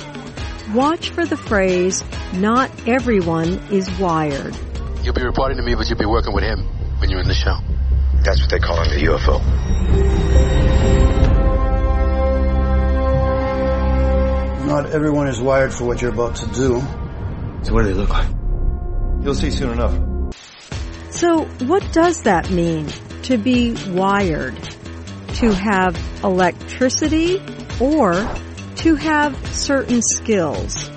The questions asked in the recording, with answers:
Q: So what does that mean to be wired?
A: not everyone is wired means the woman has skills that other people do not have.